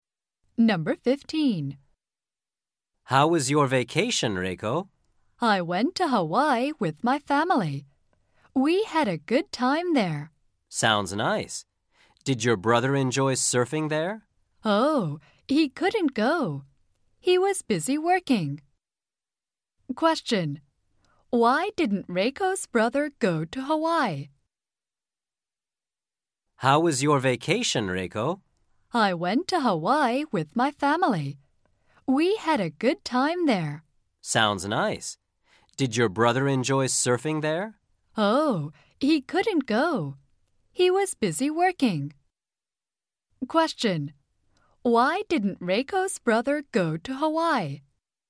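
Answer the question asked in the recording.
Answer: He was busy working.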